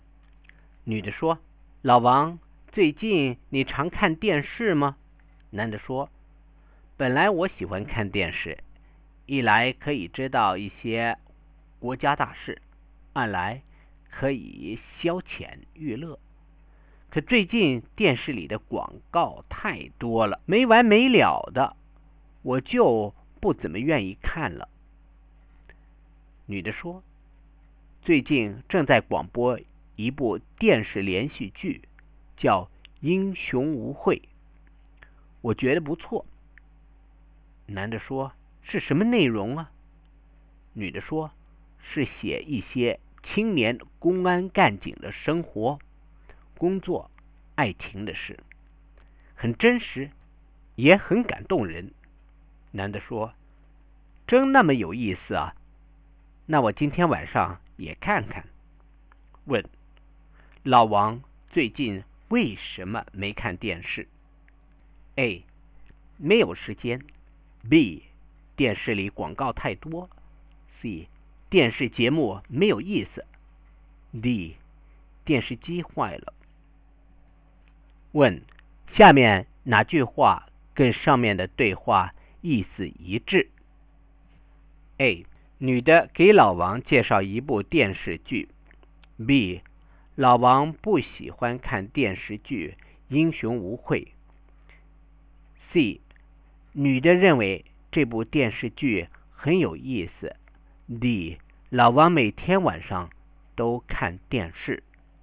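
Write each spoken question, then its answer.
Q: 老王最近为什么没看电视?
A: B: 电视里广告太多。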